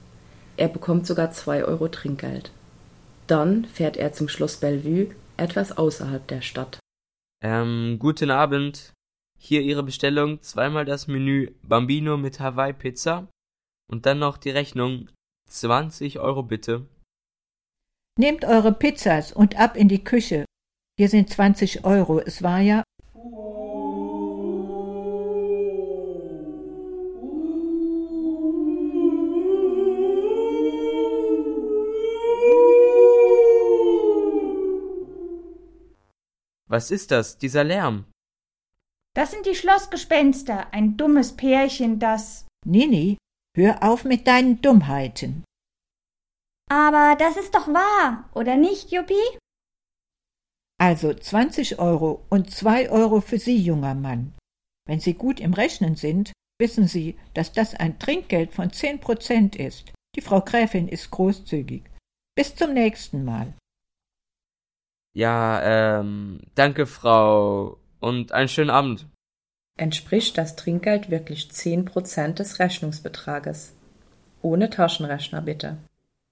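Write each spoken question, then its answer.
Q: Entspricht das Trinkgeld wirklich 10% des Rechnungsbetrages?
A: Ja, 2 Euro sind 10% von 20 Euro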